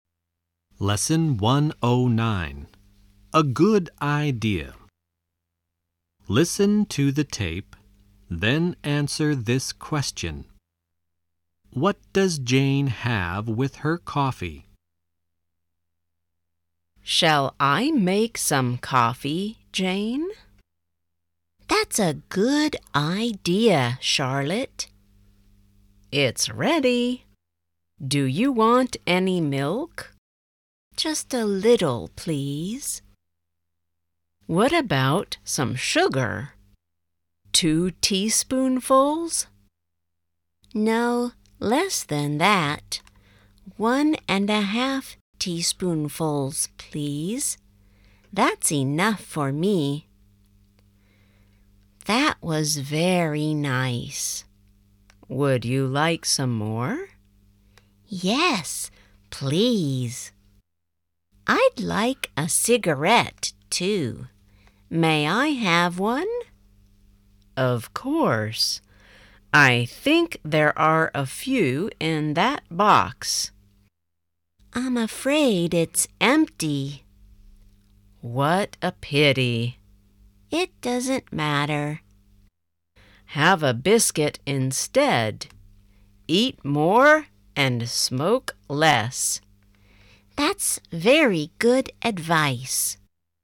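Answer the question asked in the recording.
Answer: A little milk and one and a half teaspoonfuls of sugar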